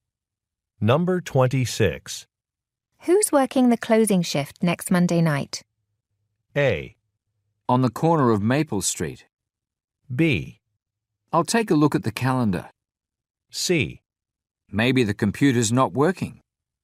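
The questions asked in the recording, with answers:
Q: Who's working the closing shift next Monday night?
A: B: I'll take a look at the calendar.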